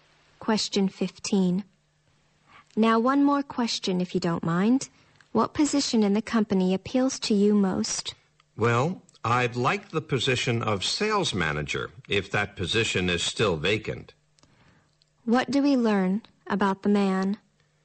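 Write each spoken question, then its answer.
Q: What do we learn about the man?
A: He is applying for a job and would like to be sales manager.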